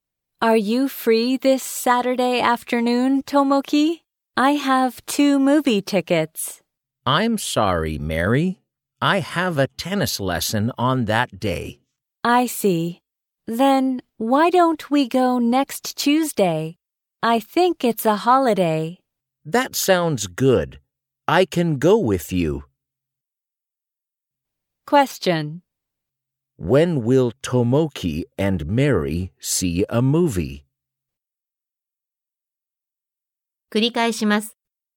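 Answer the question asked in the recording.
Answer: Next Tuesday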